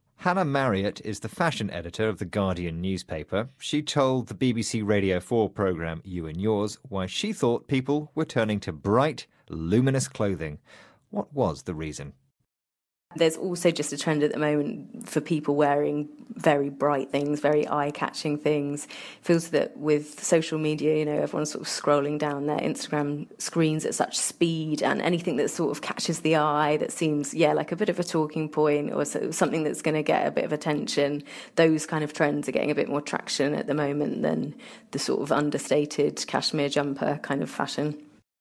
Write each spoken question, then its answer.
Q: What was the reason?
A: So her reason is social media.